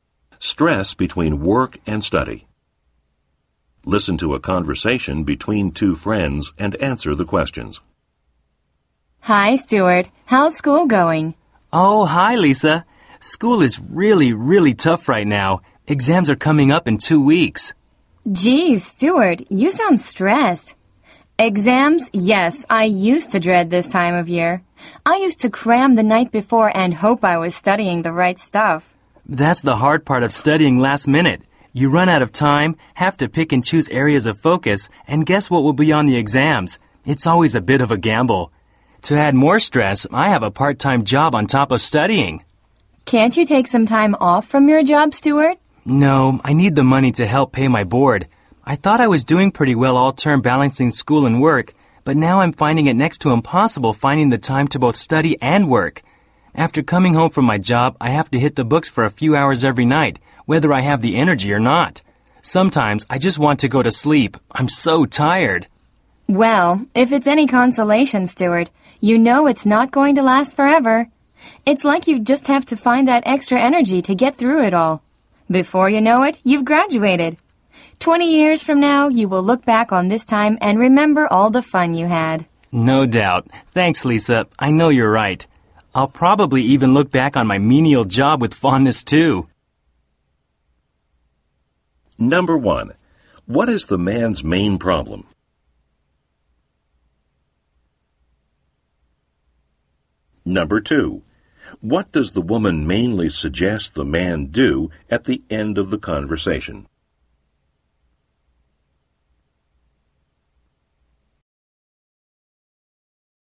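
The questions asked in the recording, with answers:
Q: What is the man's main problem?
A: He is stressed balancing studying for exams with his part-time job.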